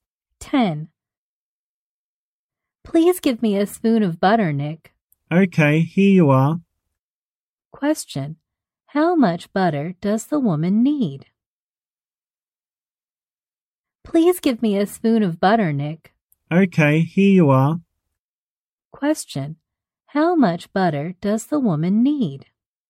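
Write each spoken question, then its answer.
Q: How much butter does the woman need?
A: A spoon of butter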